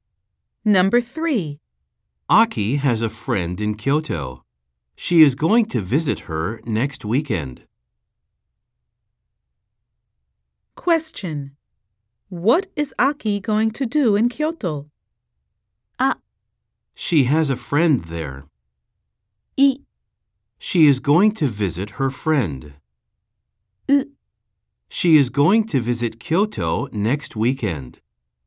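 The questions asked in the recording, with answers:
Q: What is Aki going to do in Kyoto?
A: イ: She is going to visit her friend.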